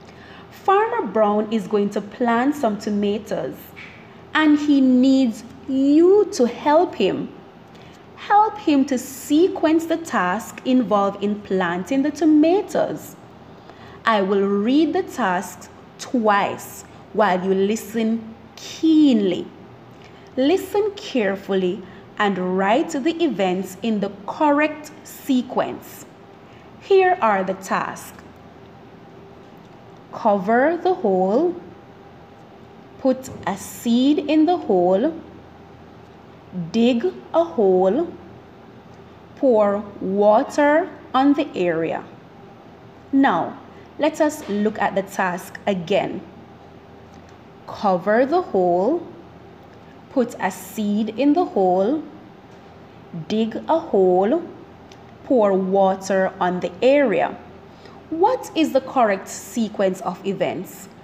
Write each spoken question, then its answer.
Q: What is the correct sequence of events?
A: So at first, we dig a hole, then we put a seed in the hole, then we cover the hole, and lastly, pour water on the area.